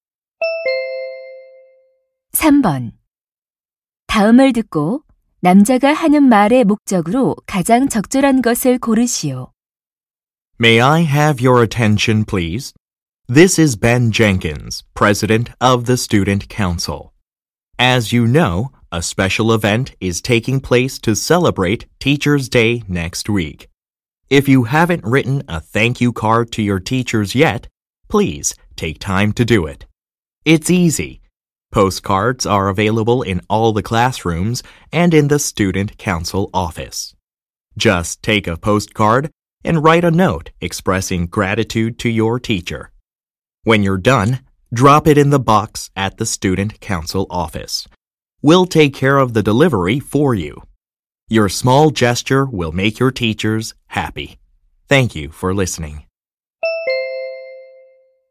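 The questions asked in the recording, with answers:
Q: 다음을 듣고 남자가 하는 말의 목적으로 가장 적절한 것을 고르시오.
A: 스승의 날 감사 카드를 써서 학생회실 상자에 넣도록 독려하려고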